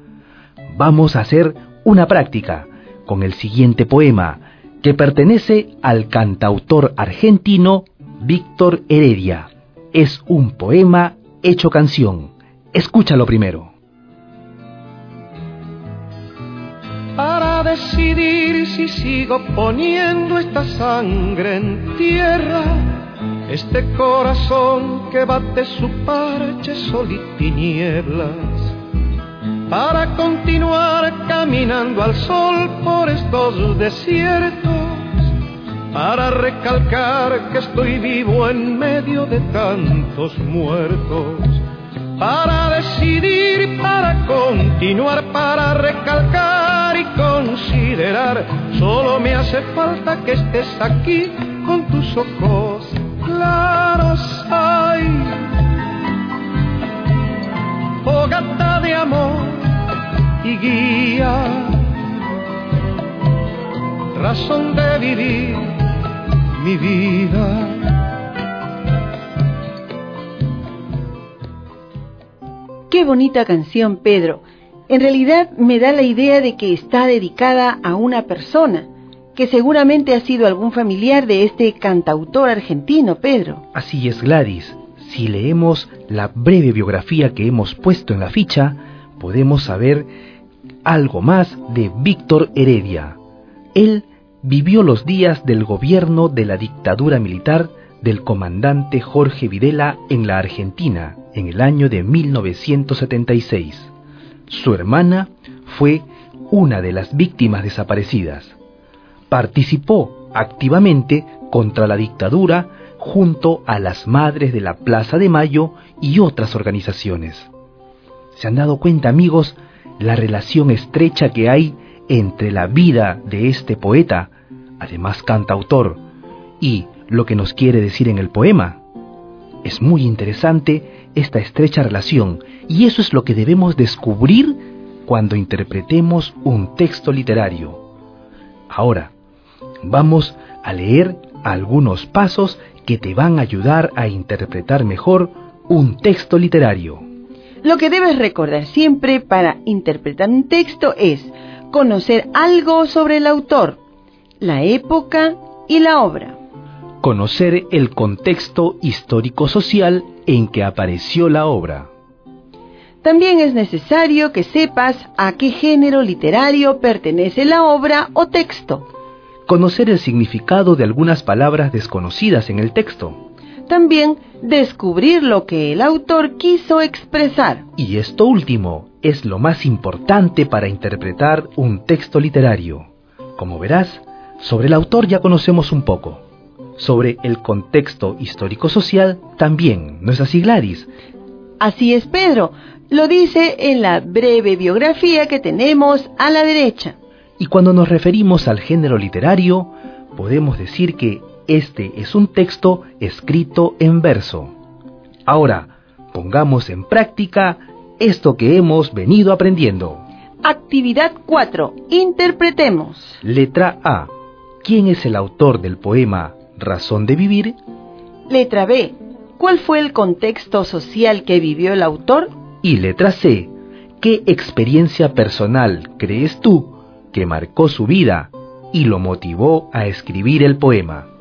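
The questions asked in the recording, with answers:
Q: ¿cuál fue el contexto social que vivió el autor?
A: La dictadura militar de Jorge Videla en Argentina (1976)

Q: ¿qué experiencia personal crees tú que marcó su vida y lo motivó a escribir el poema?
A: La desaparición de su hermana durante la dictadura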